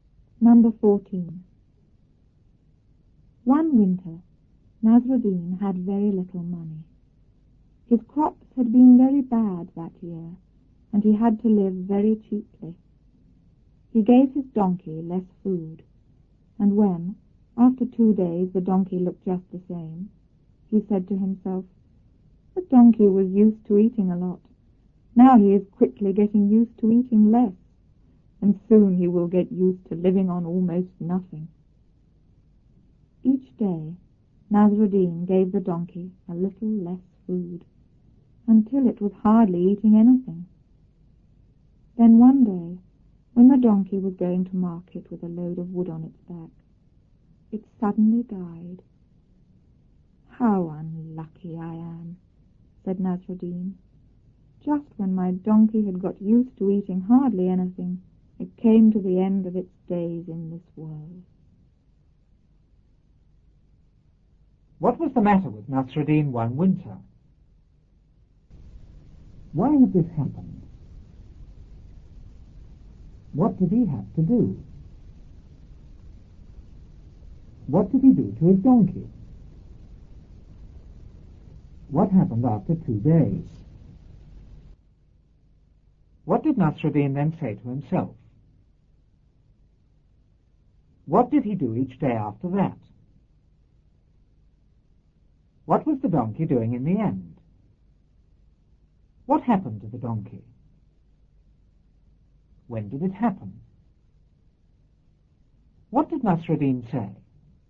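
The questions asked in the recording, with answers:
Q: What was the matter with Nasruddin one winter?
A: He had very little money.

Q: Why had this happened?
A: His crops had been very bad that year.

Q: What did he have to do?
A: He had to live very cheaply.

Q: What did he do to his donkey?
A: He gave it less food.

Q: What happened after 2 days?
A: The donkey looked just the same.

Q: What did Nasruddin then say to himself?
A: The donkey was getting used to eating less and would soon get used to living on almost nothing.

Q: What did he do each day after that?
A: He gave the donkey a little less food.

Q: What was the donkey doing in the end?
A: It was hardly eating anything.

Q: What happened to the donkey?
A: It suddenly died.

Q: When did it happen?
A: When it was going to market with a load of wood on its back.

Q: What did Nasruddin say?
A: How unlucky he was: just when the donkey had got used to eating hardly anything, it died.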